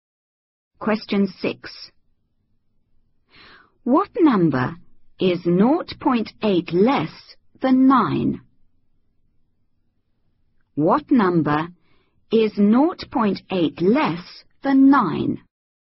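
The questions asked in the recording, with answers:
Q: What number is 0.8 less than 9?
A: 8.2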